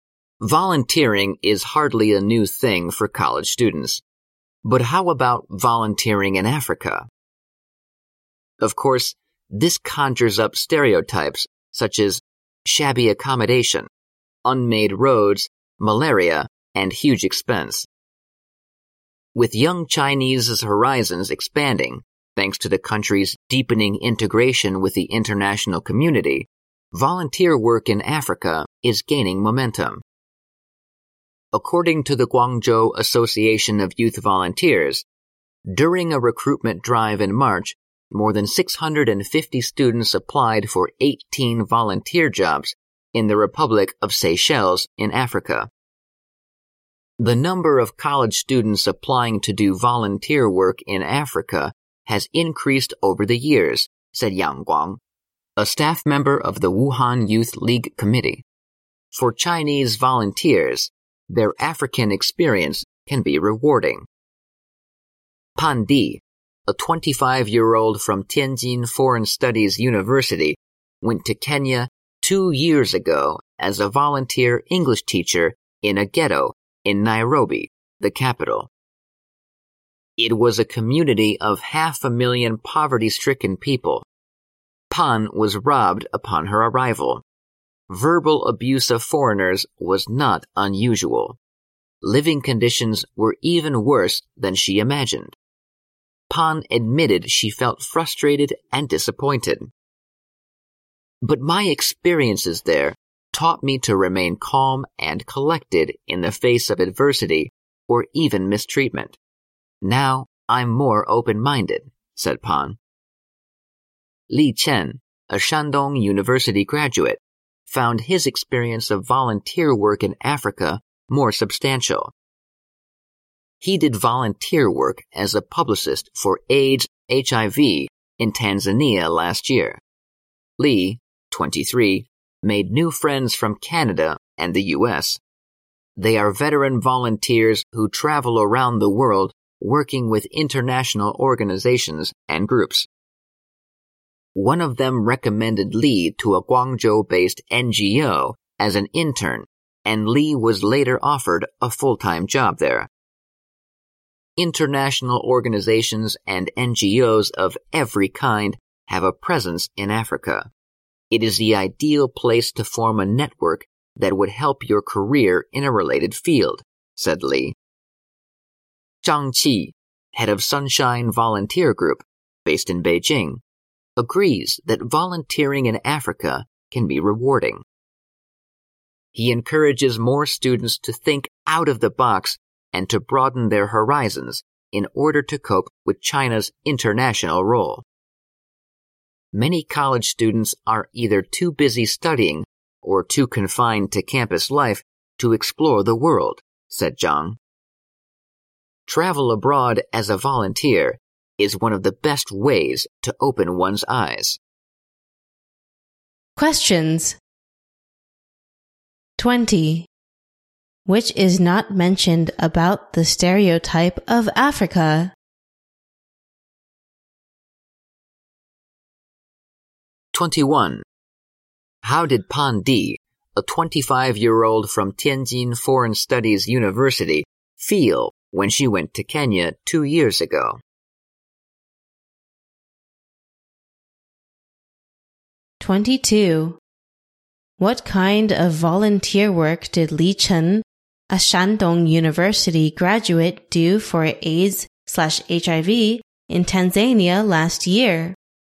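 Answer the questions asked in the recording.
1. Frustrated and disappointed
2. He worked as a publicist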